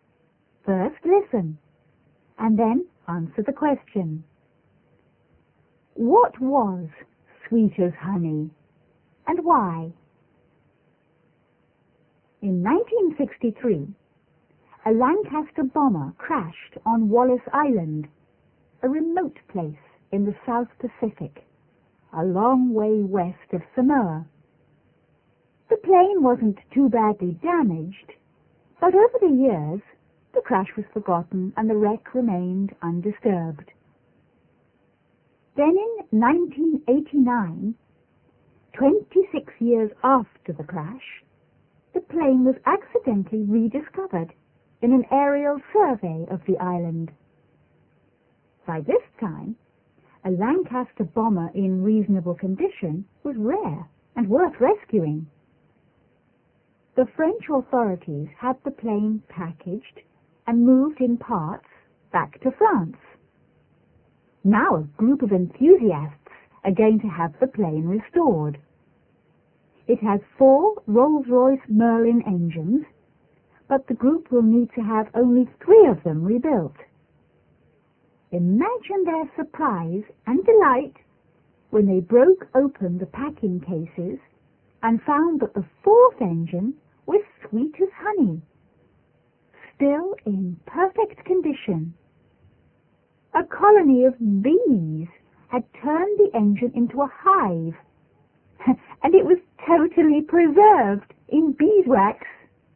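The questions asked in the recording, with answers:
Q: What was sweet as honey, and why?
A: The fourth engine of the plane, because bees had made a hive in it and preserved it in beeswax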